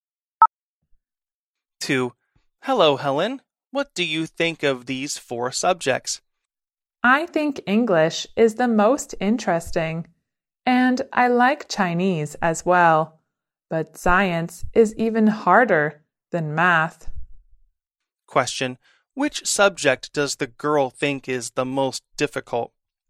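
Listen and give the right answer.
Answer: Science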